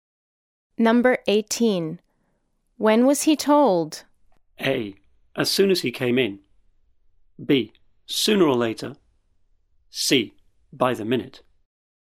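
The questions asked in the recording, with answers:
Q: When was he told?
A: A: As soon as he came in.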